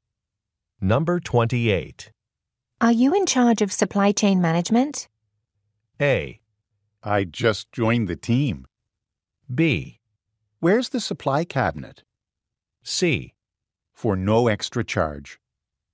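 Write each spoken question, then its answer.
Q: Are you in charge of supply chain management?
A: A: I just joined the team.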